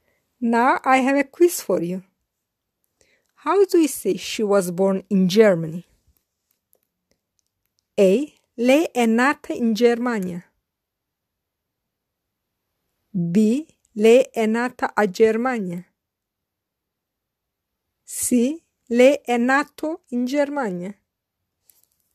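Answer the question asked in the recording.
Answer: A: Lei è nata in Germania.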